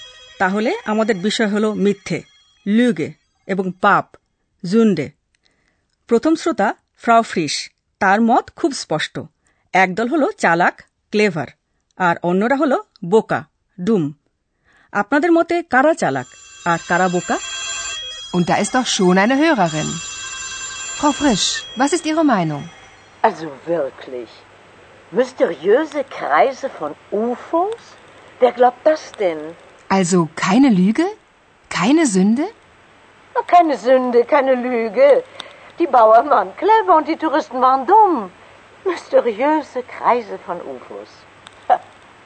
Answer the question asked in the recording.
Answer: Frau ফ্রিসের Motte, Krishokra, Bauern, Chalak, a Touristra, Boka.